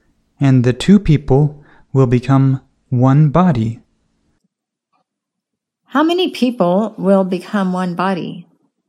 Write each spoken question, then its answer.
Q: How many people will become one body?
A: Two. Two people will become one body.